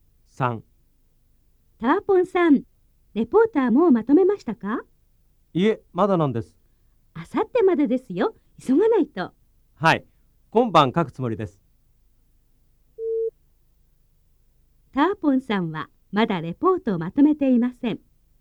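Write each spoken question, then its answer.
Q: ターポンさんはまだレポートをまとめていません。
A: ○(正しい)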